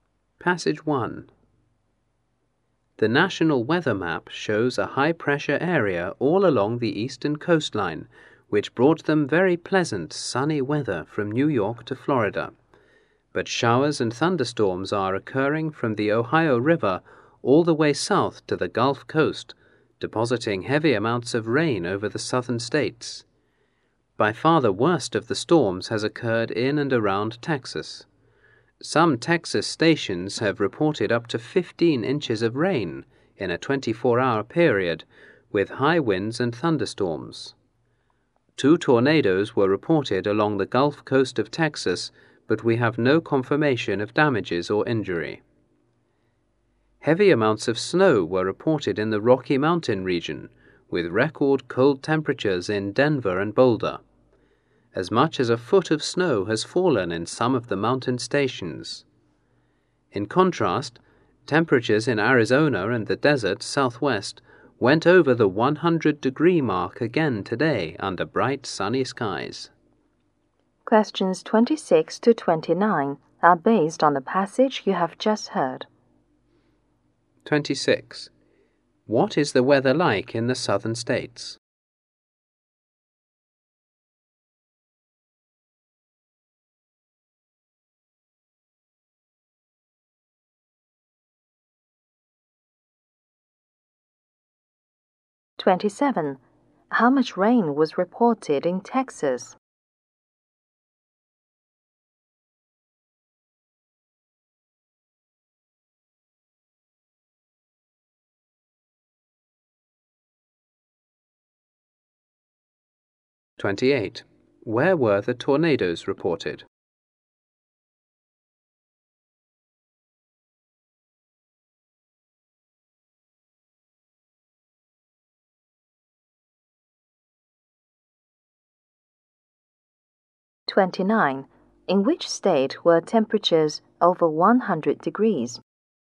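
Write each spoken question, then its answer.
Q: What is the weather like in the southern states?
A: Showers and thunderstorms with heavy rain.

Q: How much rain was reported in Texas?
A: Up to 15 inches in 24 hours.

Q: Where were the tornadoes reported?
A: Along the Gulf Coast of Texas.

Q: In which state were temperatures over 100 degrees?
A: Arizona.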